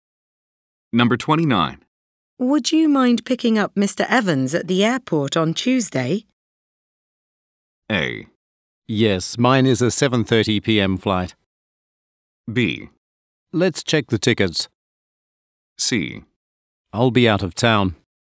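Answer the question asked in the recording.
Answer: C: I'll be out of town.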